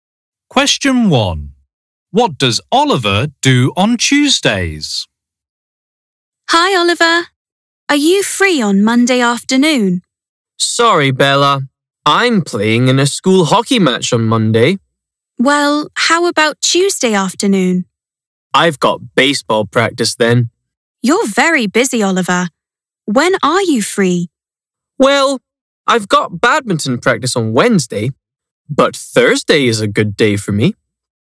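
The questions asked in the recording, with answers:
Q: What does Oliver do on Tuesdays?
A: He has baseball practice.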